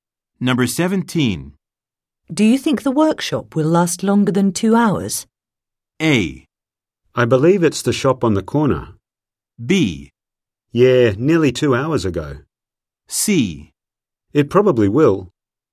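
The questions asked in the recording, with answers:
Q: Do you think the workshop will last longer than two hours?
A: C: It probably will.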